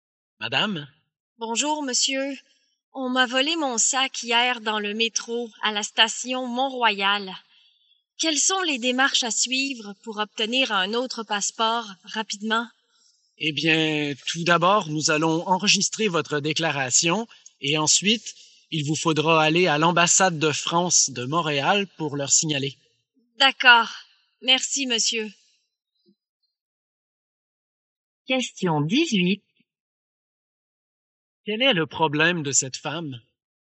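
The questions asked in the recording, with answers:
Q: Quel est le problème de cette femme?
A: On lui a volé son sac (avec son passeport) dans le métro.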